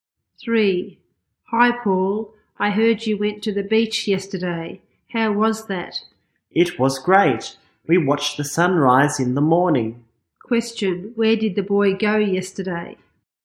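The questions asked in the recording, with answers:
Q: Question, where did the boy go yesterday?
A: The beach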